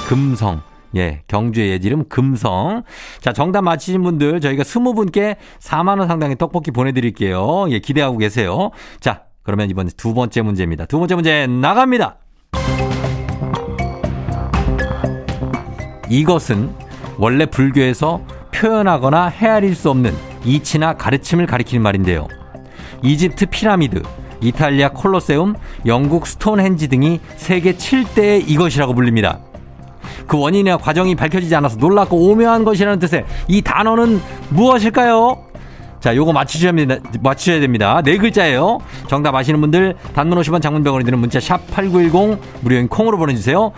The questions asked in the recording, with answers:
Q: 그 원인이나 과정이 밝혀지지 않아서 놀랍고 오묘한 것이라는 뜻의 이 단어는 무엇일까요?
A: 불가사리 아니고 불가사의.